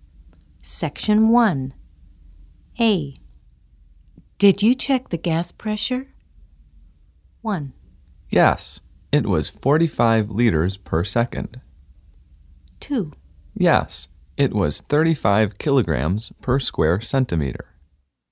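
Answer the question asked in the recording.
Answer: 2: Yes, it was 35 kilograms per square centimeter.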